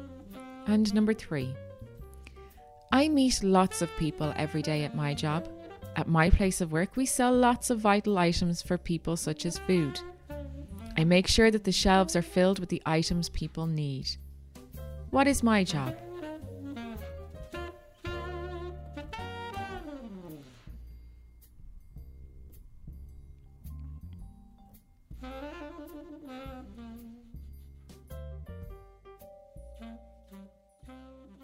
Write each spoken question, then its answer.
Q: What is my job?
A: I am a shop worker or a shopkeeper.